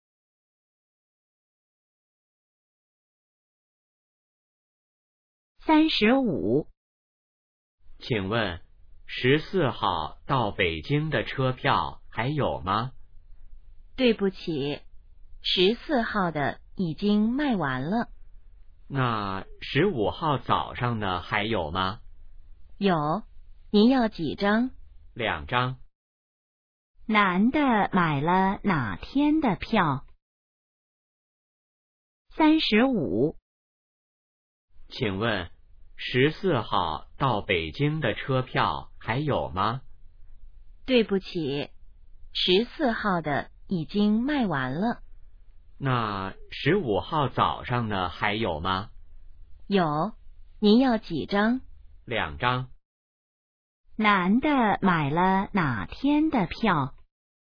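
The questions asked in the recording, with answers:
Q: 男的买了哪天的票?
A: 15号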